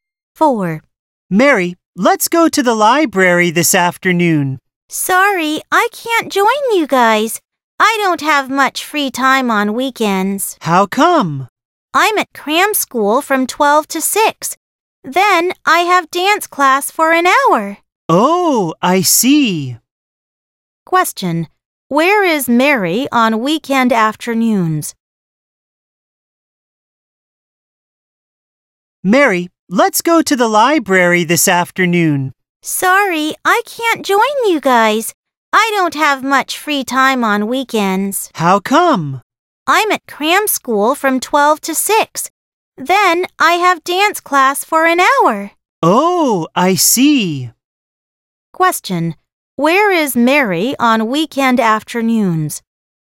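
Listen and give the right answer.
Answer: At cram school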